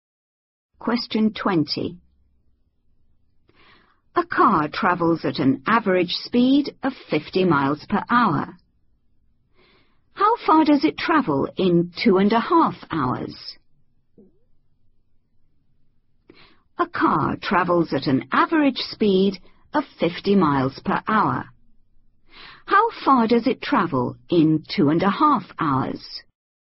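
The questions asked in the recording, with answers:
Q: How far does it travel in 2.5 hours?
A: 125 miles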